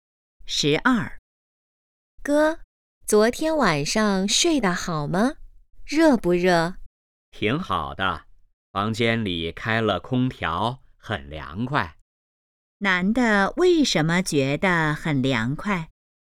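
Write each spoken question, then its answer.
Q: 男的为什么觉得很凉快?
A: 房间里开了空调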